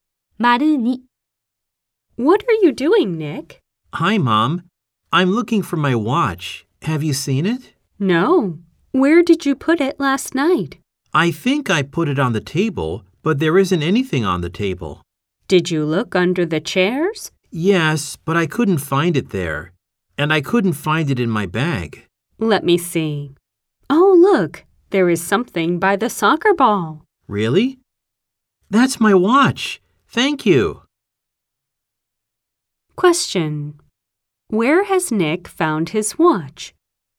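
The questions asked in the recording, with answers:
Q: Where has Nick found his watch?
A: By the soccer ball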